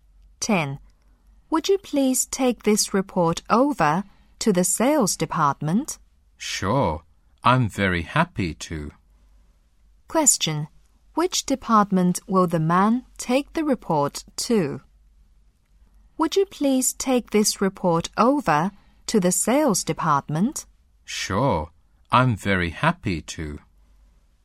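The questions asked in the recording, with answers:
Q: Which department will the man take the report to?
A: The sales department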